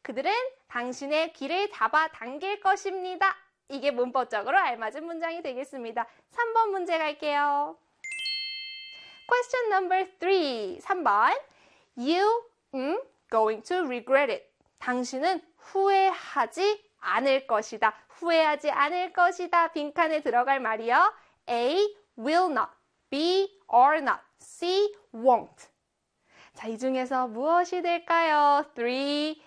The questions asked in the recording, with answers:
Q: You going to regret it.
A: 그렇죠. B에 are not 비동사 들어가야 되지요.